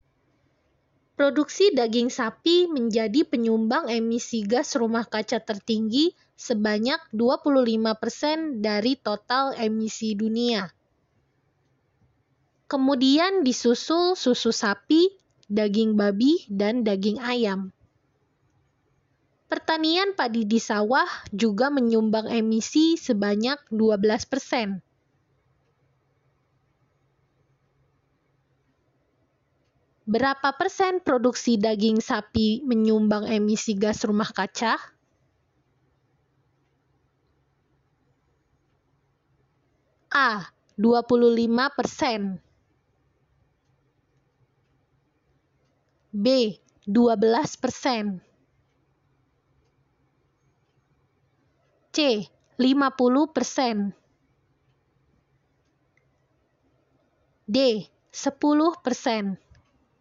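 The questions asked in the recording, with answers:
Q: Berapa persen produksi daging sapi menyumbang emisi gas rumah kaca?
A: A: 25%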